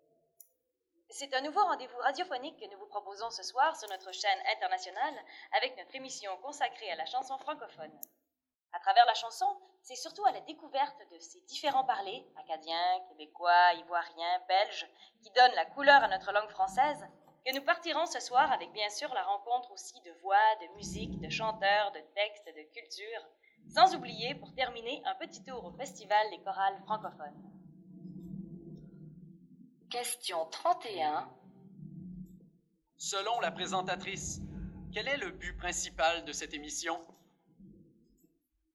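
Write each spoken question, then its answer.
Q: Selon la présentatrice, quel est le but principal de cette émission ?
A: Faire découvrir, à travers la chanson, les différents parlers de la langue française (acadiens, québécois, ivoiriens, belges)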